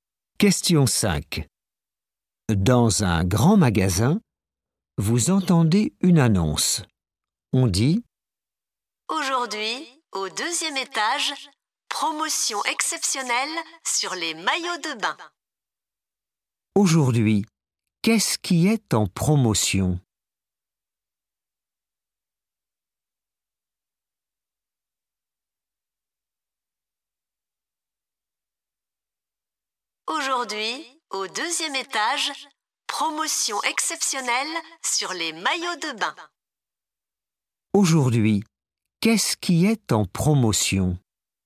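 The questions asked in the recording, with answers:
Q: Aujourd'hui, qu'est-ce qui est en promotion?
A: Les maillots de bain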